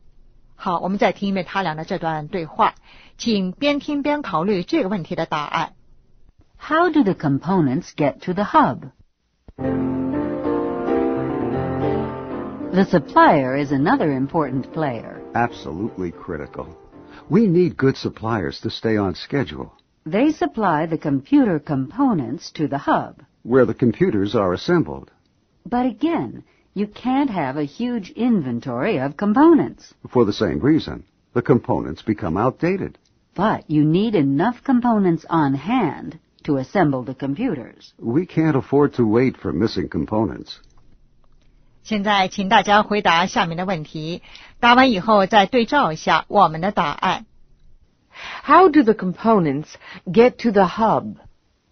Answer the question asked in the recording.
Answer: The suppliers send the components.